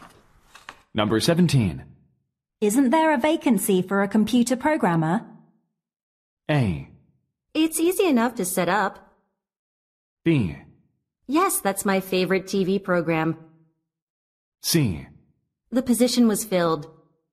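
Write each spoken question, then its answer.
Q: Isn't there a vacancy for a computer programmer?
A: C: The position was filled.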